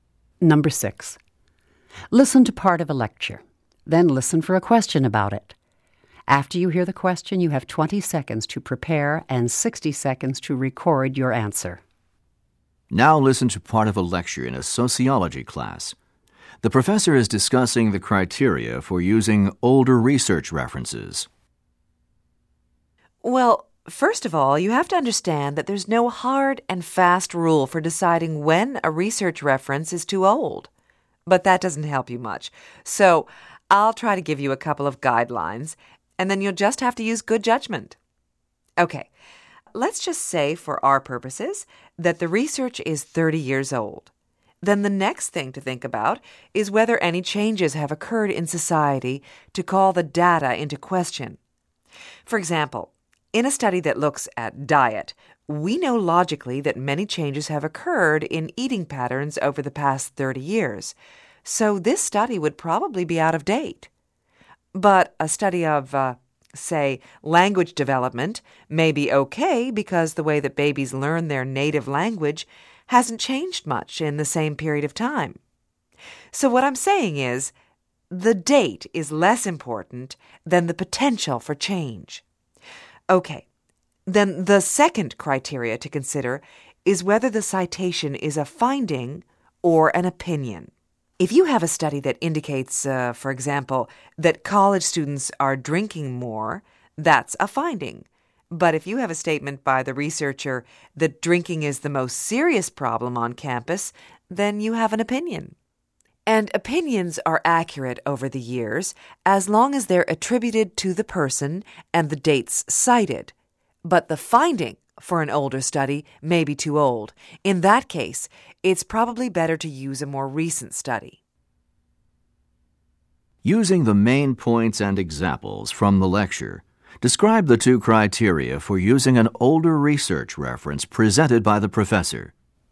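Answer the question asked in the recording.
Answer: First, whether society has changed in ways that call the data into question (a diet study may be outdated, but a language development study may not be). Second, whether it is a finding or an opinion: opinions stay valid if attributed and dated, but old findings may be too old.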